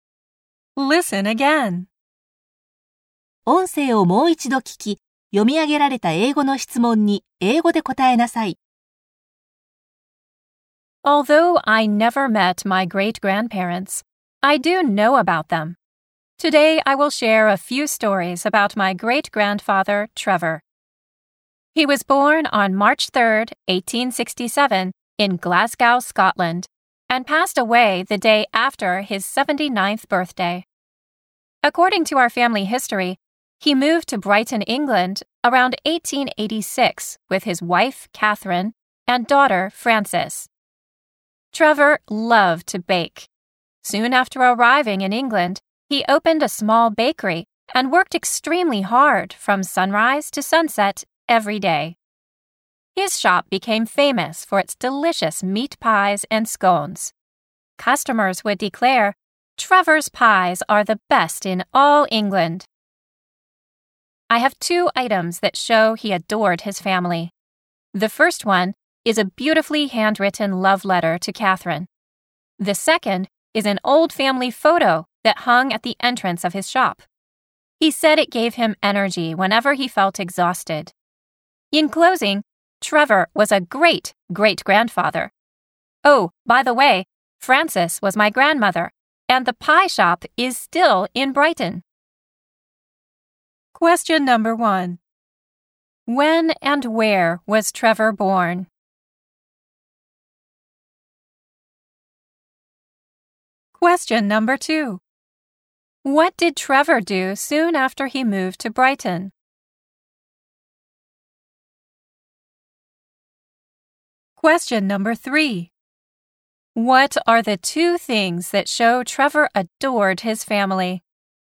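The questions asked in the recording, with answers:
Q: When and where was Trevor born?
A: On March 3rd, 1867, in Glasgow, Scotland.

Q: What did Trevor do soon after he moved to Brighton?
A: He opened a small bakery.

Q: What are the two things that show Trevor adored his family?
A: A handwritten love letter to Catherine and an old family photo in his shop.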